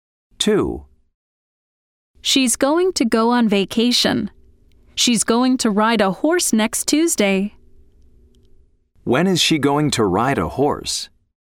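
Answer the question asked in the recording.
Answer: next Tuesday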